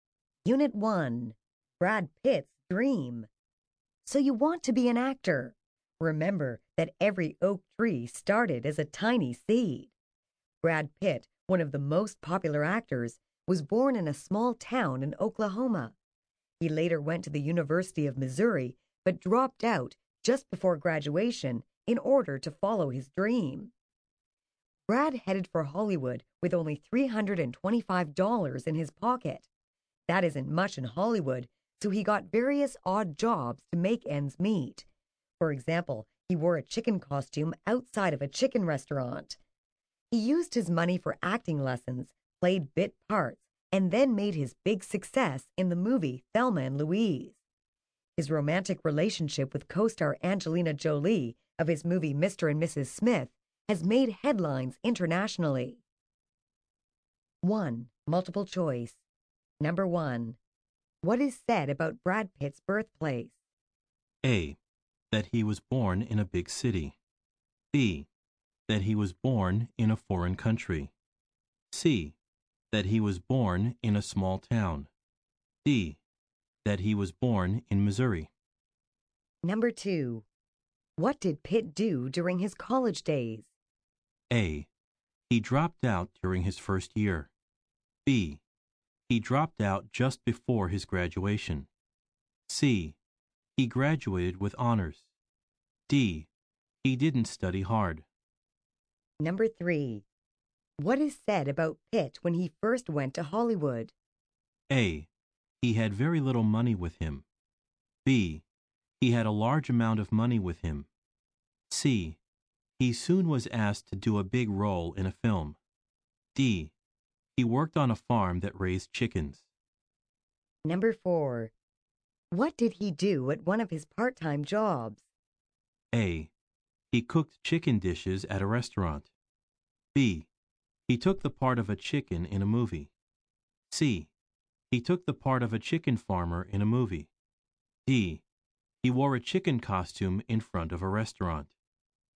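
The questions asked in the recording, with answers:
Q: What is said about Brad Pitt's birthplace?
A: C: That he was born in a small town.

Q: What did Pitt do during his college days?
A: B: He dropped out just before his graduation.

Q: What is said about Pitt when he first went to Hollywood?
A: A: He had very little money with him.

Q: What did he do at one of his part-time jobs?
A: D: He wore a chicken costume in front of a restaurant.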